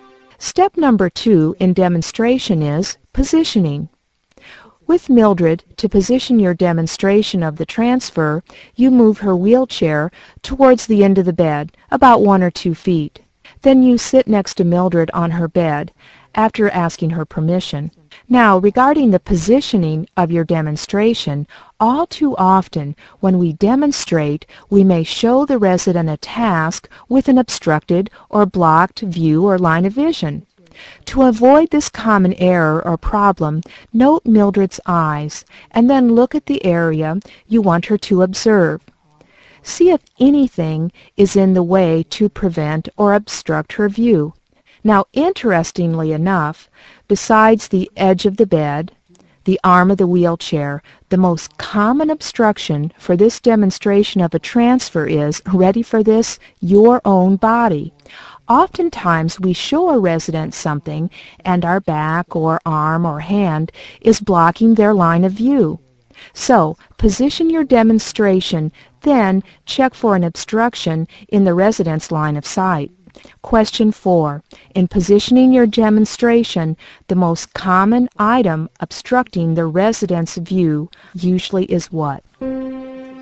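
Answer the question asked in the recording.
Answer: Your own body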